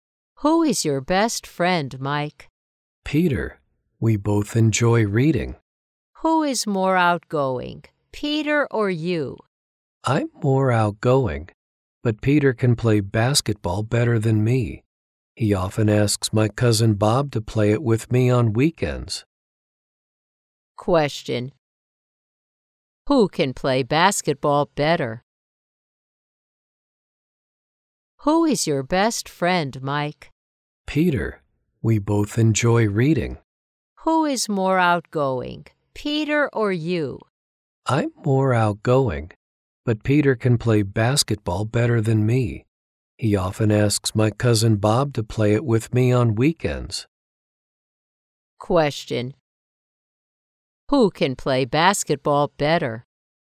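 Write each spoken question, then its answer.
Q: Who can play basketball better?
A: Peter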